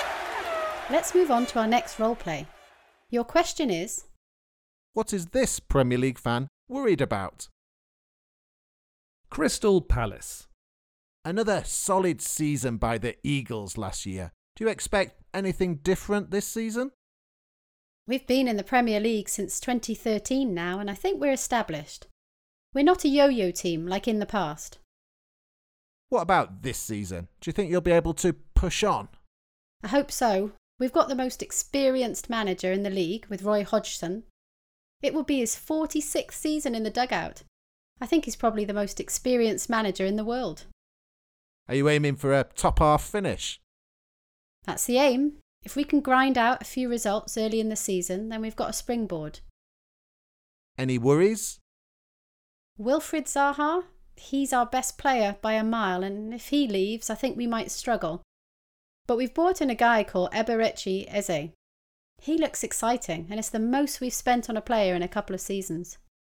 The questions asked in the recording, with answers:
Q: what is this Premier League fan worried about?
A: She was worried about Palace's star player, Wilfried Zaha, leaving the club.